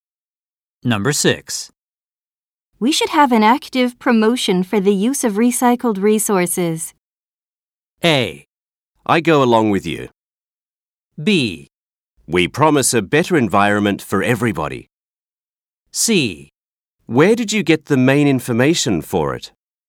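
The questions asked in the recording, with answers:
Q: We should have an active promotion for the use of recycled resources.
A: A: I go along with you.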